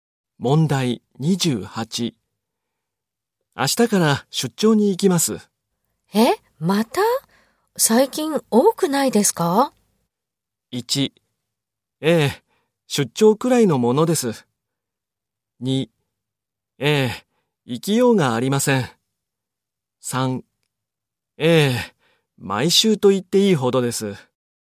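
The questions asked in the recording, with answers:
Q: 明日から出張に行きます。え?また?最近多くないですか?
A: 1: ええ、毎週と言っていいほどです。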